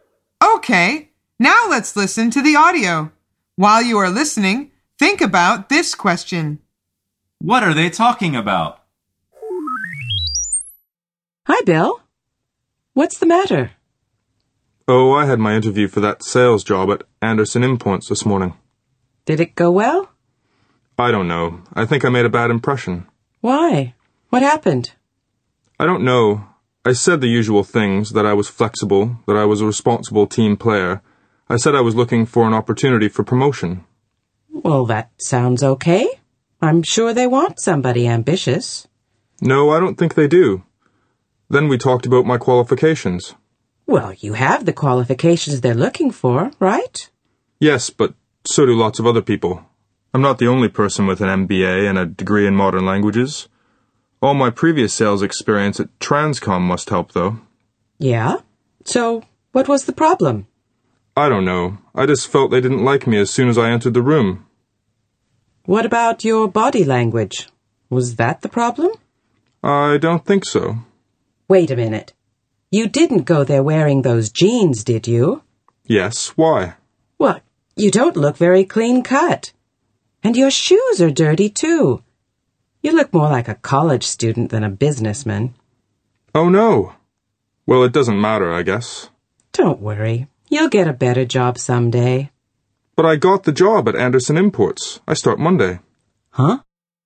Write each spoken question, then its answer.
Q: What are they talking about?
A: The answer is the man's job interview that morning.